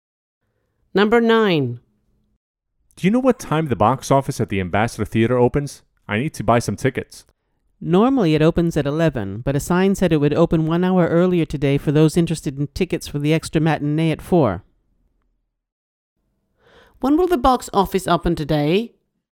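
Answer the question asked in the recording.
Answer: At 10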